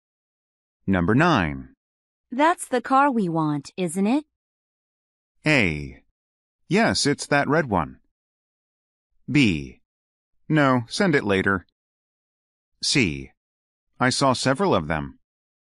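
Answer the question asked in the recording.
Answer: A: Yes, it's that red one.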